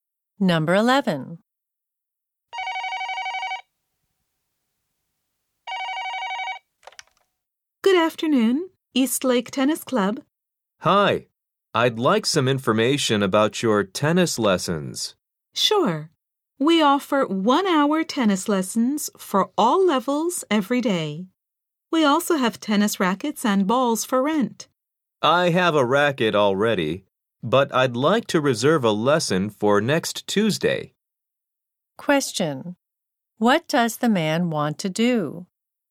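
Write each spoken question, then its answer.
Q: What does the man want to do?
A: Reserve a tennis lesson for next Tuesday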